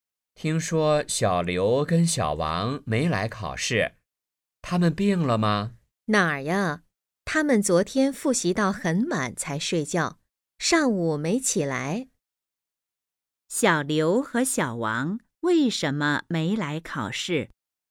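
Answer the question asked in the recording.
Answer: 昨天复习到很晚才睡,上午没起来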